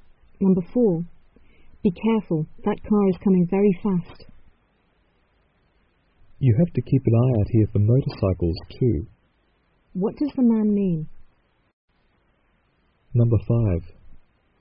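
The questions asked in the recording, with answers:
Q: What does the man mean?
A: They must watch out for motorcycles too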